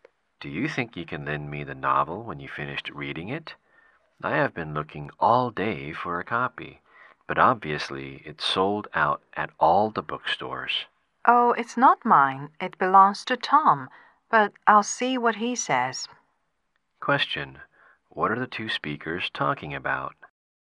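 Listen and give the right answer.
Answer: A novel that belongs to Tom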